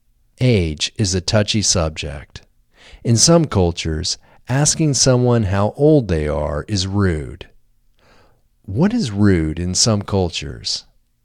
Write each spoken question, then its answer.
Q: What is rude in some cultures?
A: Asking someone how old they are is rude in some cultures.